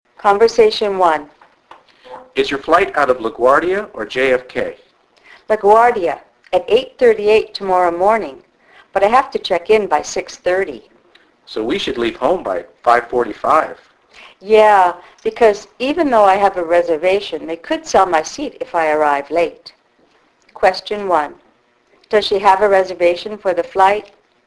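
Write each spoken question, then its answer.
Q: Does she have a reservation for the flight?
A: Yes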